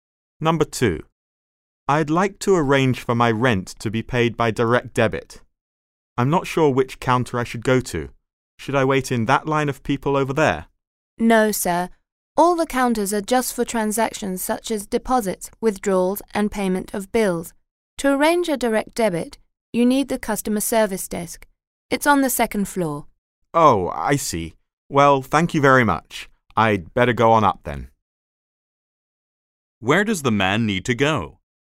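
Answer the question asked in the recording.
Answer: The customer service desk on the second floor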